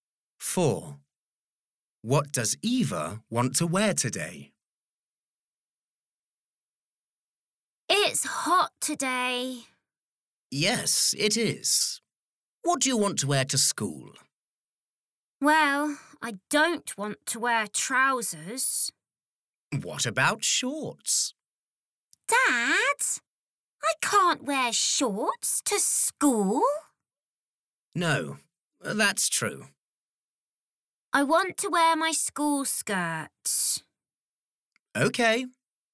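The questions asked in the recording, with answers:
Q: What does Eva want to wear today?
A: her school skirt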